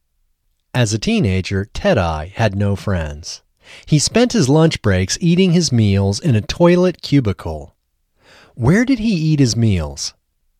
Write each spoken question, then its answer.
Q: Where did he eat his meals?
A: He ate his meals in a toilet cubicle.